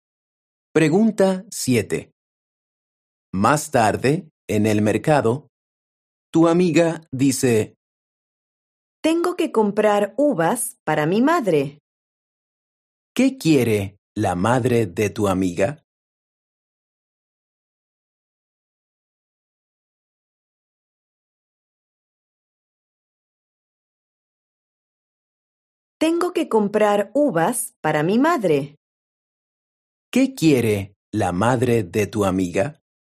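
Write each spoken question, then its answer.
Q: ¿Qué quiere la madre de tu amiga?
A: uvas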